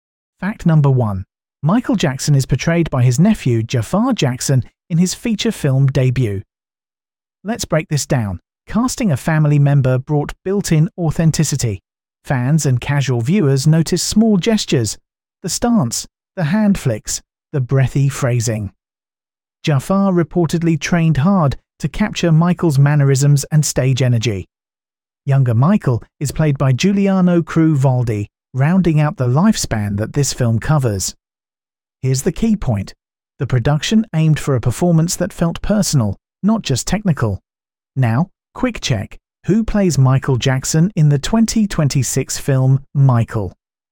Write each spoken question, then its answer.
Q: Who plays Michael Jackson in the 2026 film Michael?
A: Correct answer. Jafar Jackson.